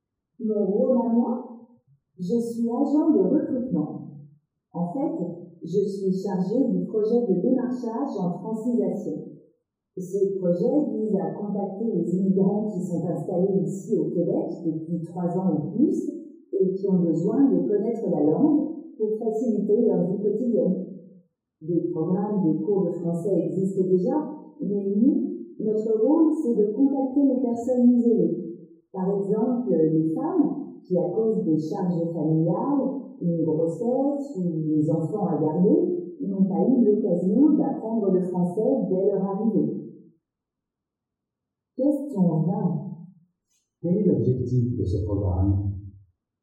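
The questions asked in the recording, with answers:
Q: Quel est l'objectif de ce programme?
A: Contacter les immigrants isolés, installés au Québec depuis 3 ans ou plus, pour leur offrir d'apprendre le français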